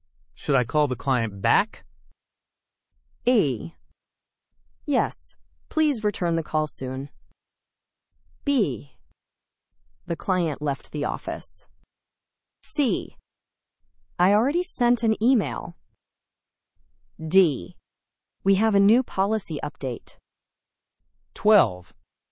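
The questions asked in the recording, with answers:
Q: Should I call the client back?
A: A: Yes, please return the call soon.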